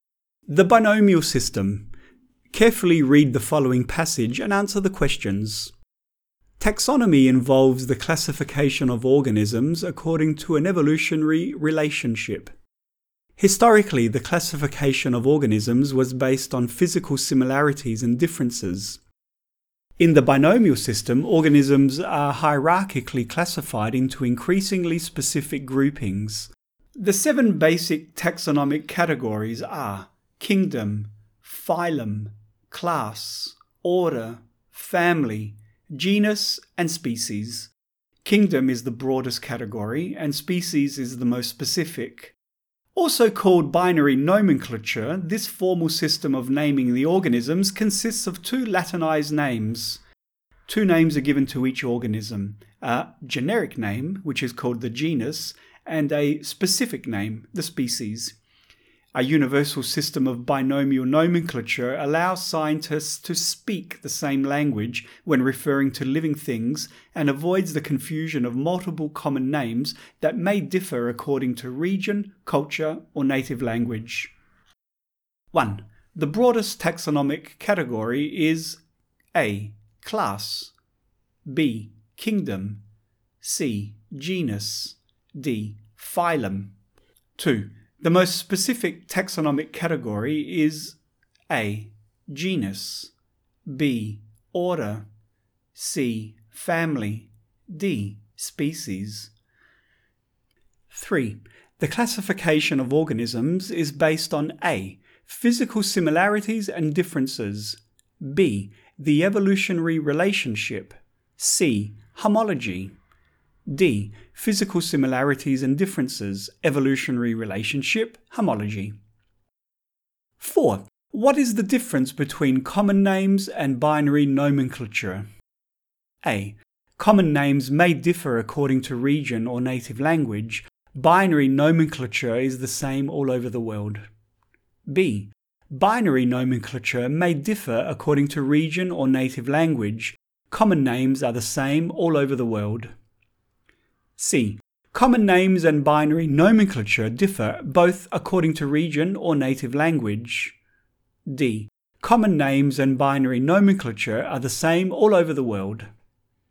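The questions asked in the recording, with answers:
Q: The broadest taxonomic category is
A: B: Kingdom

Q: The most specific taxonomic category is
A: D: Species

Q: What is the difference between common names and binary nomenclature?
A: A: Common names may differ according to region or native language. Binary nomenclature is the same all over the world.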